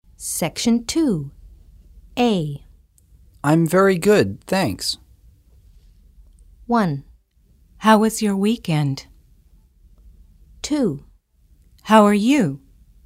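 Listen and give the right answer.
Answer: 2: How are you?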